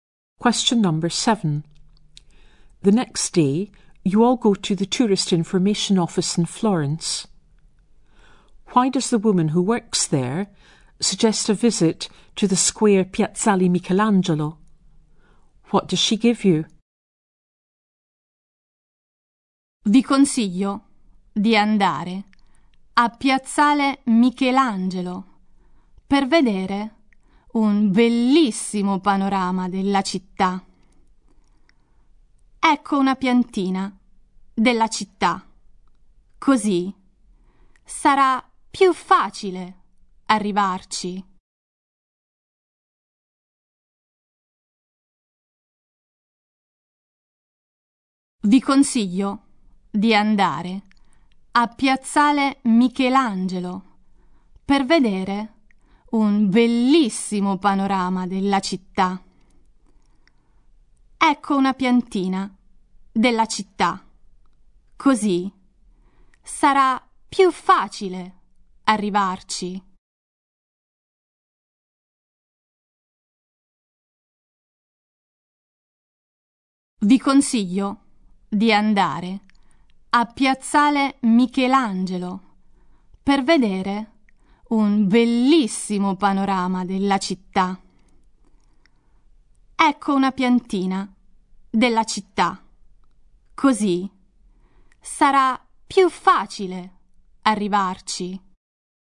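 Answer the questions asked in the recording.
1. To see a beautiful view of the city
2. A map of the city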